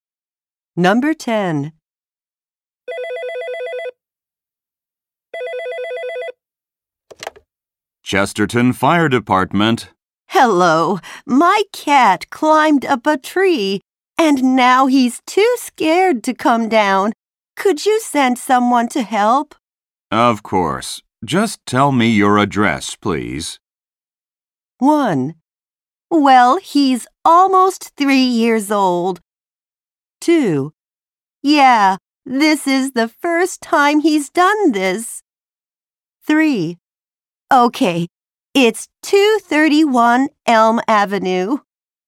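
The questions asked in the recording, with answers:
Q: Of course. Just tell me your address, please.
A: 3: Okay, it's 231 Elm Avenue.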